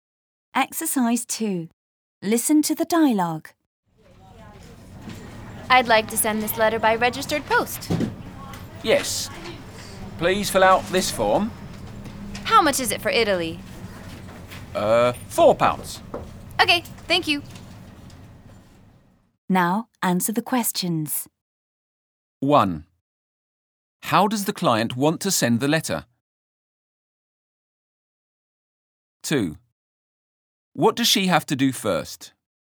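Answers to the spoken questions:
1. By registered post
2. Fill out a form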